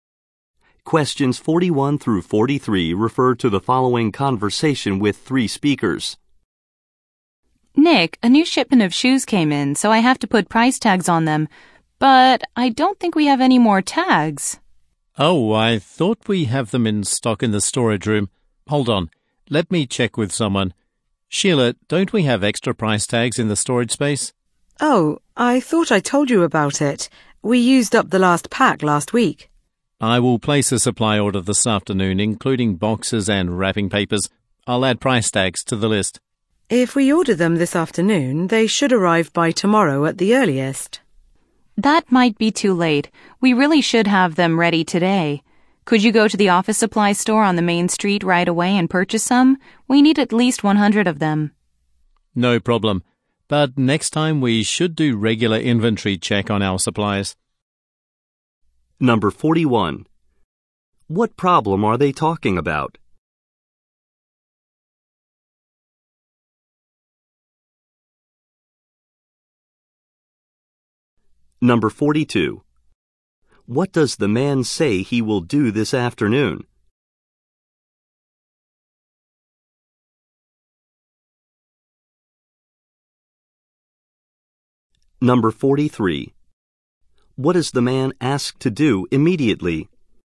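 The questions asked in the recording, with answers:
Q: What problem are they talking about?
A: They have run out of price tags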